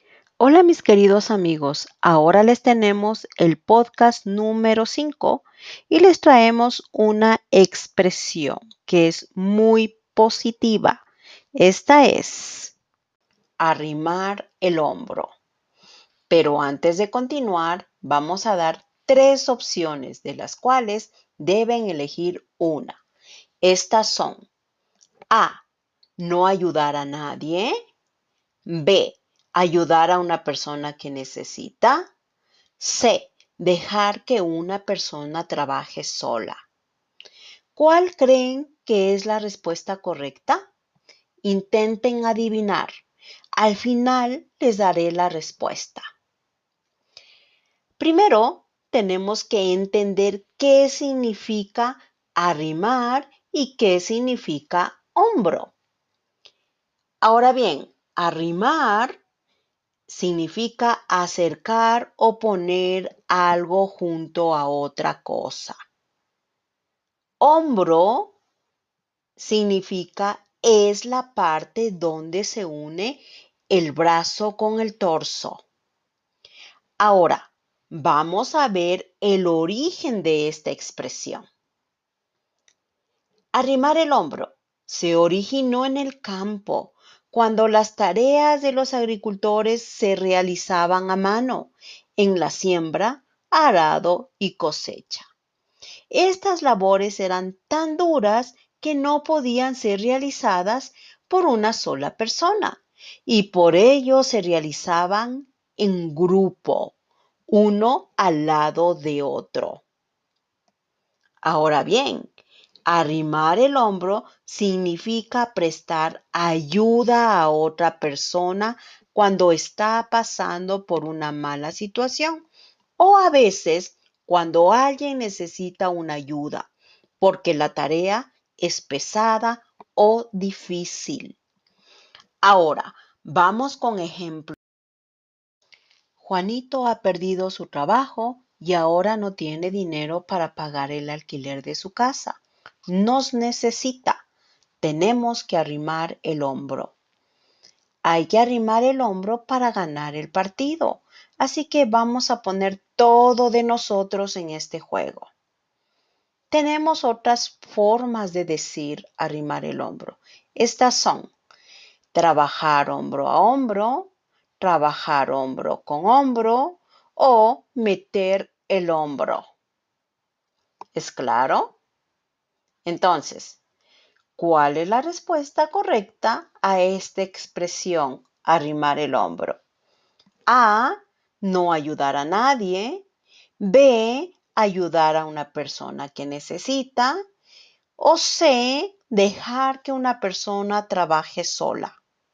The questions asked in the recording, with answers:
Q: Entonces, ¿cuál es la respuesta correcta a esta expresión, arrimar el hombro?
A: La respuesta es B, ayudar a una persona que necesita.